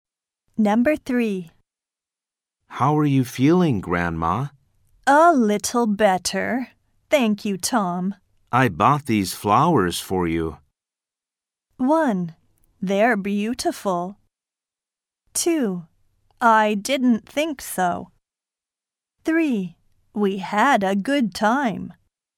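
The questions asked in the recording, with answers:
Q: I bought these flowers for you.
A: 1: They're beautiful.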